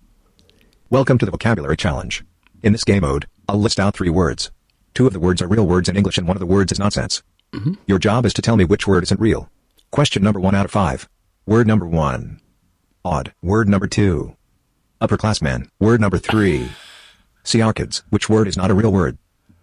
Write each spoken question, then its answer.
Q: Which word is not a real word?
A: The lie was word number 3.